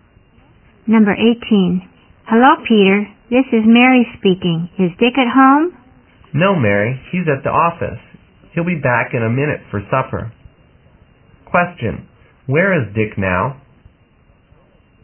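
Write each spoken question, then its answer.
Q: Question, where is Dick now?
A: At the office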